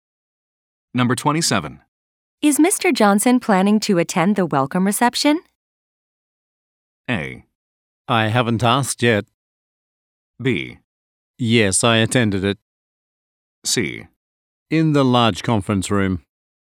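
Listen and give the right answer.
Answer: A: I haven't asked yet.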